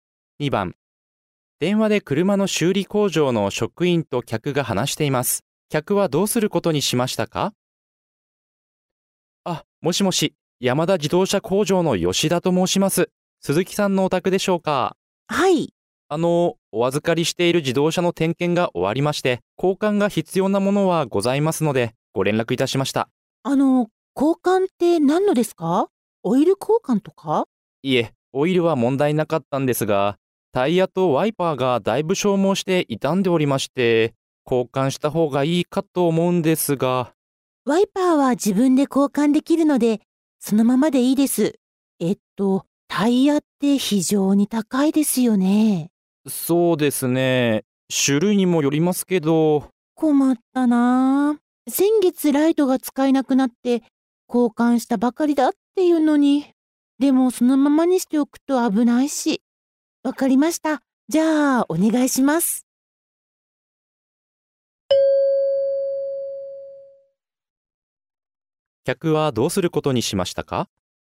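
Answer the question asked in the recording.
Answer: タイヤだけ交換してもらう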